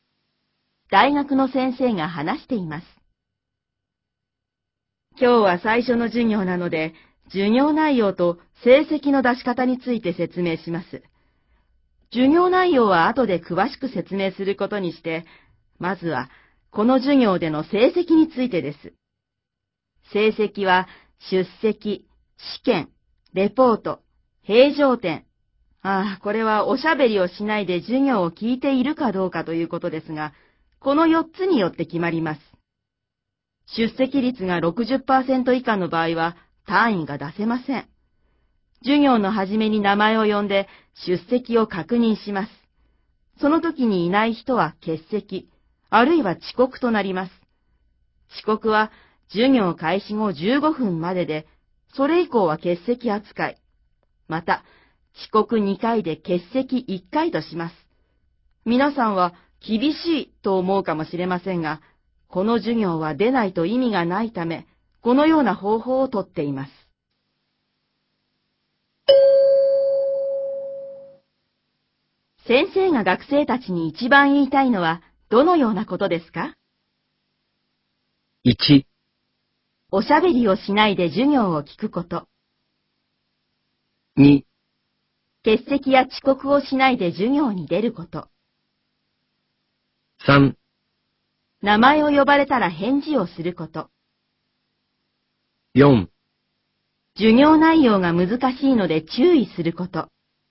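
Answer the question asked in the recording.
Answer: 2: 欠席や遅刻をしないで授業に出ること。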